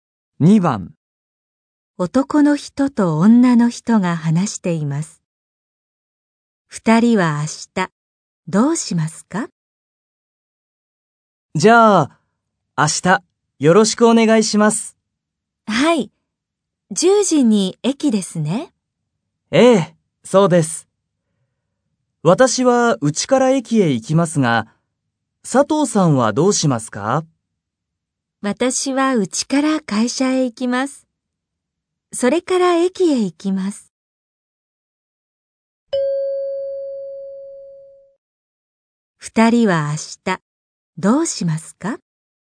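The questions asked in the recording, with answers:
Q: 二人は明日、どうしますか?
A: 10時に駅で会います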